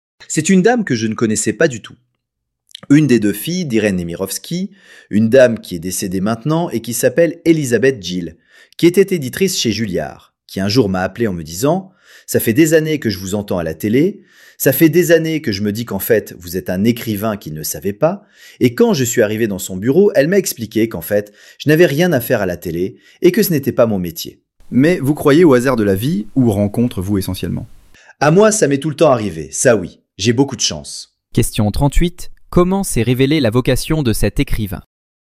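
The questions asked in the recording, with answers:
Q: Comment s'est révélée la vocation de cet écrivain ?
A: Grâce à une éditrice de Julliard, Elisabeth Gill, qui l'a appelé pour lui dire qu'il était un écrivain qui s'ignorait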